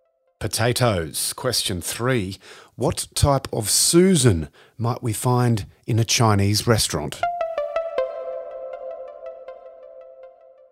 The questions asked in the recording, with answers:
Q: What type of Susan might we find in a Chinese restaurant?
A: A lazy Susan.